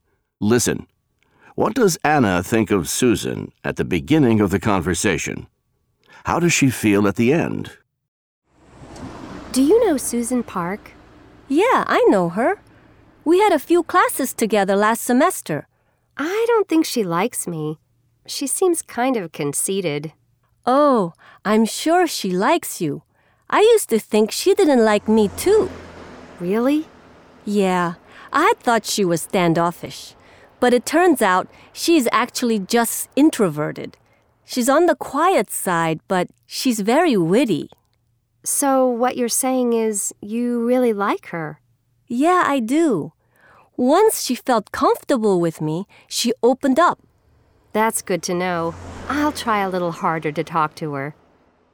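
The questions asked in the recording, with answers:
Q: What does Anna think of Susan at the beginning of the conversation?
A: She thinks Susan doesn't like her and seems kind of conceited.

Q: How does she feel at the end?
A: She feels better about Susan and will try harder to talk to her.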